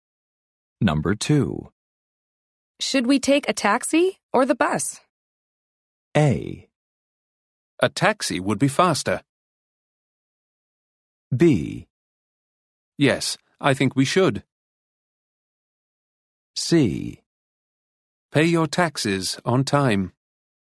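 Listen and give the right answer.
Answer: A: A taxi would be faster.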